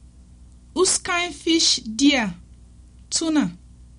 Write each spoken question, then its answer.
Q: Whose kind fish dear?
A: Tuna fish dear.